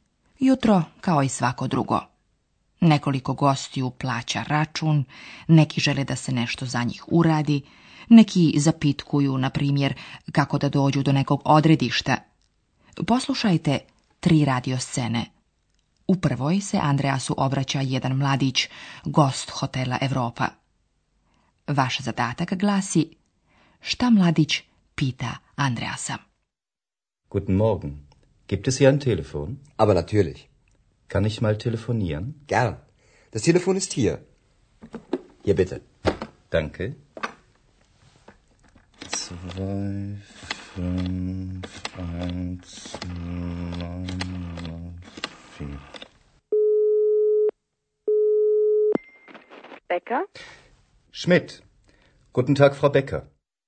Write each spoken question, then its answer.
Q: Šta mladić pita Andreasa?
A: Mladić je pitao Andreasa ima li u blizini neki telefon.